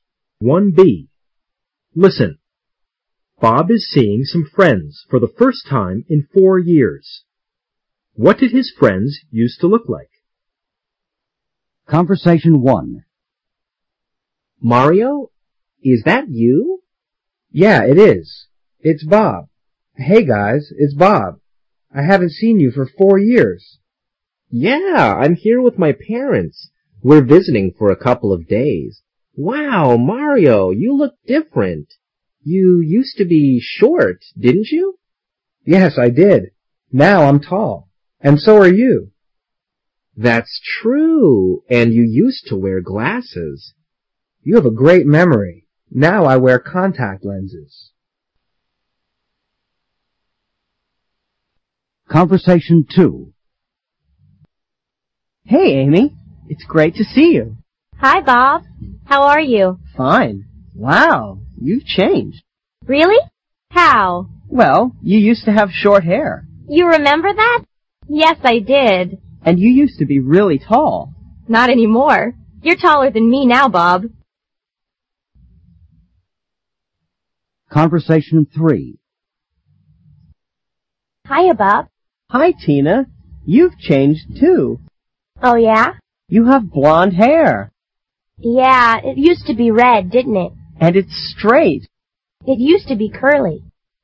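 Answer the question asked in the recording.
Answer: Mario used to be short and wear glasses; Amy used to have short hair and be really tall; Tina used to have red, curly hair.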